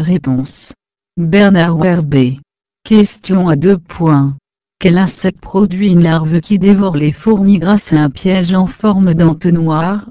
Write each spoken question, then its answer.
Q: Quel insecte produit une larve qui dévore les fourmis grâce à un piège en forme d'entonnoir?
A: fourmilion.